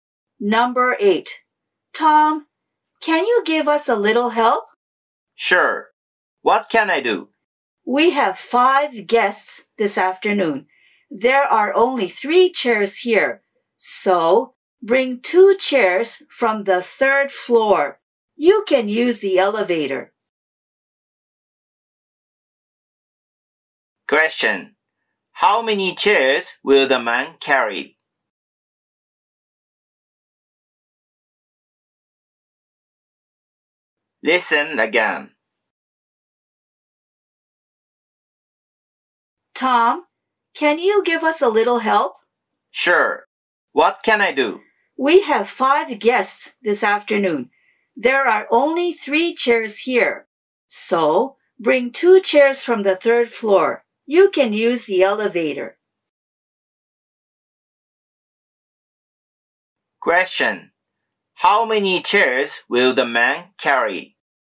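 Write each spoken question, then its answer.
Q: How many chairs will the man carry?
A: Two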